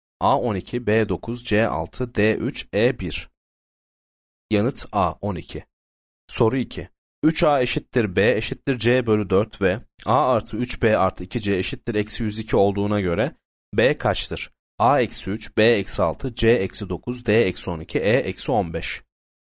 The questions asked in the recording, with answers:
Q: 3a eşittir b eşittir c bölü 4 ve a artı 3b artı 2c eşittir eksi 102 olduğuna göre b kaçtır?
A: Yanıt c eksi 9.